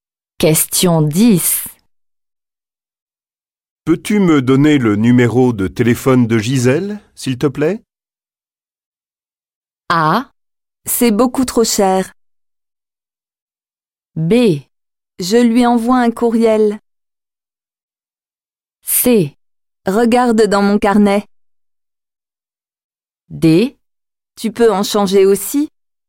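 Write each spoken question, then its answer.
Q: Peux-tu me donner le numéro de téléphone de Gisèle, s'il te plaît?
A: C: Regarde dans mon carnet.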